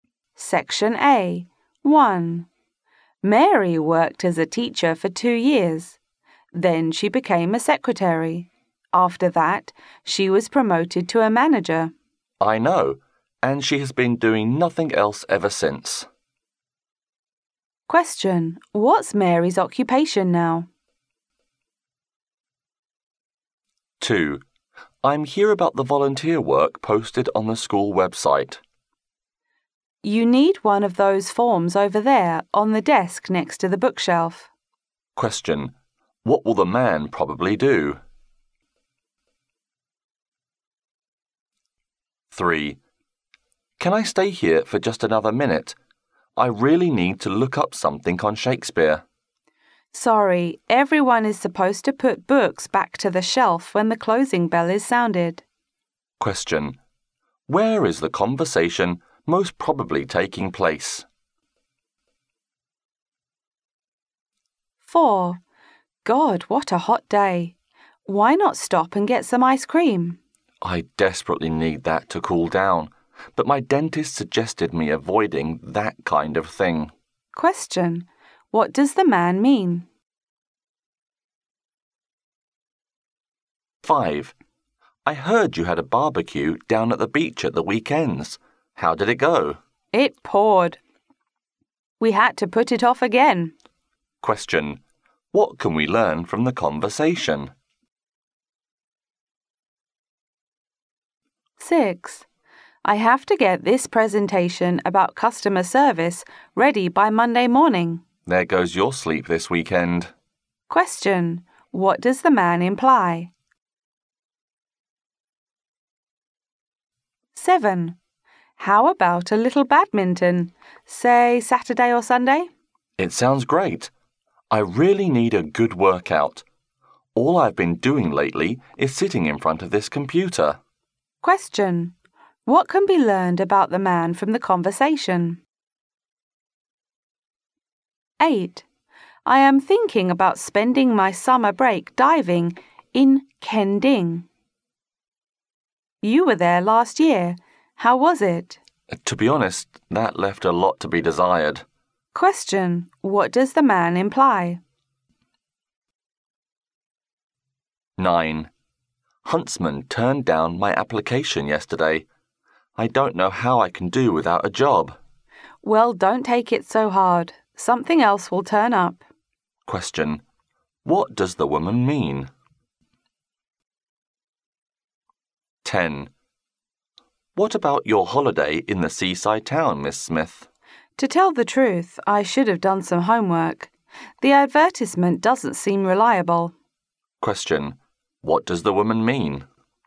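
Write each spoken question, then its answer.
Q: What's Mary's occupation now?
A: A manager

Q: What will the man probably do?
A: Fill in a form from the desk next to the bookshelf

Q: Where is the conversation most probably taking place?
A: In a library

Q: What can we learn from the conversation?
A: The barbecue was put off because of heavy rain

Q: What does the man imply?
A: The woman will have to work through the weekend with little sleep

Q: What does the woman mean?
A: The man will find another job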